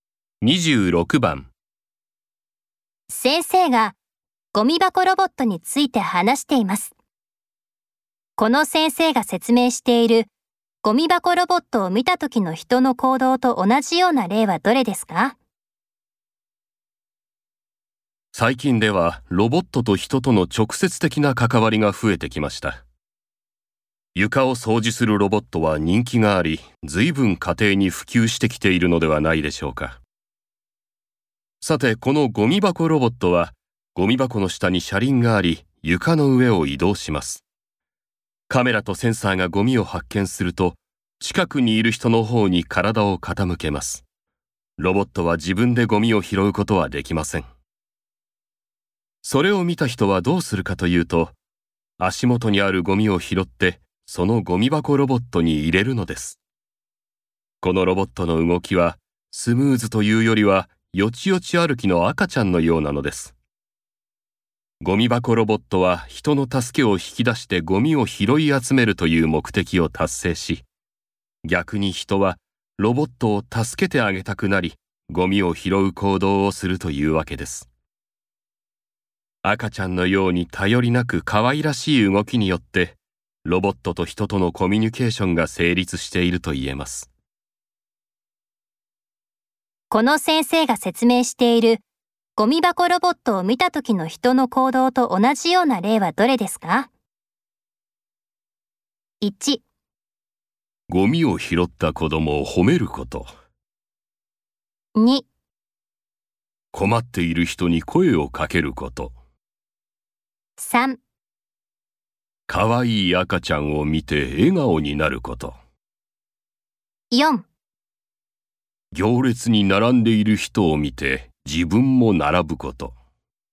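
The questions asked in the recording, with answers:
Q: この先生が説明しているゴミ箱ロボットを見た時の人の行動と同じような例はどれですか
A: 2: 困っている人に声をかけること。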